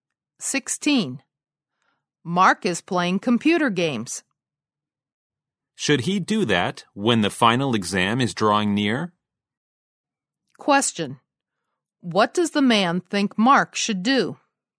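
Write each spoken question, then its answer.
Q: What does the man think Mark should do?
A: Stop playing games and prepare for the final exam.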